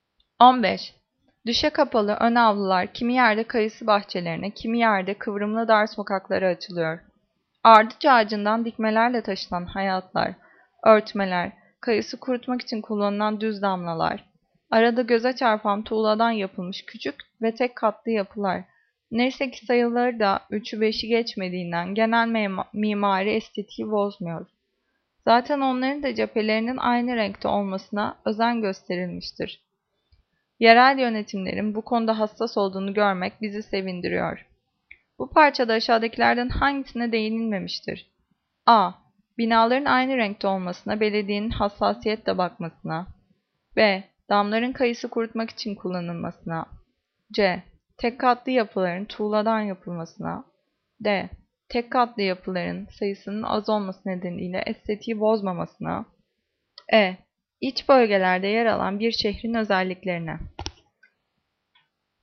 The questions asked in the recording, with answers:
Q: Bu parçada aşağıdakilerden hangisine değinilmemiştir?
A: Cevap E. İç bölgelerde yer alan bir şehrin özelliklerine.